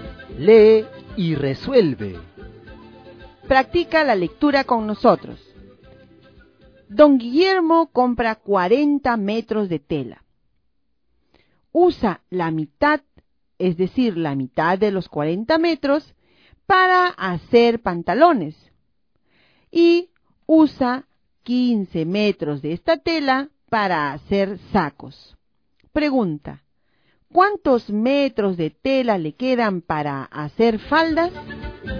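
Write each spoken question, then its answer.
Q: ¿cuántos metros de tela le quedan para hacer faldas?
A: 5 metros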